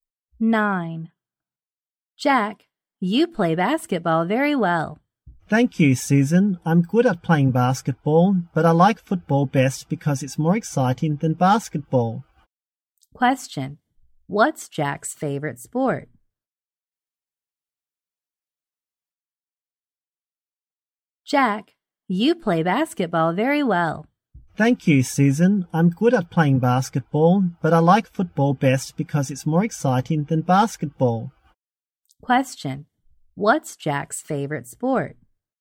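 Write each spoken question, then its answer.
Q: Question, what's Jack's favorite sport?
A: Football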